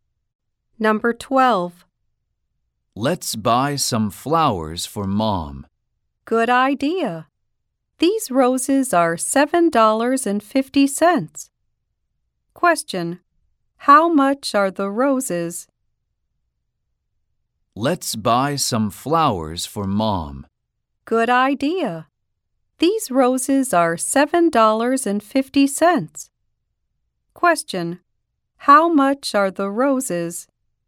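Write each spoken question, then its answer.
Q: How much are the roses?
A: $7.50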